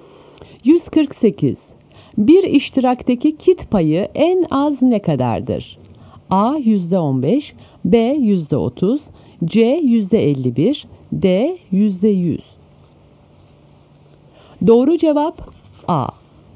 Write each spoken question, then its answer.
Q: Bir iştirakteki kit payı en az ne kadardır?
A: Doğru cevap A.